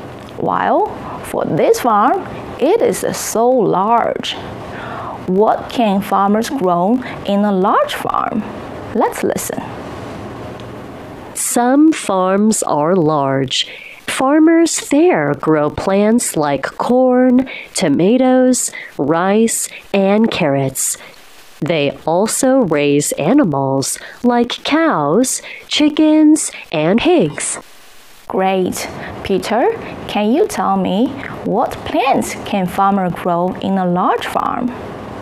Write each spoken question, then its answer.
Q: Peter, can you tell me what plants can farmers grow in a large farm?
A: They can grow plants like corn, tomatoes, rice, and carrots.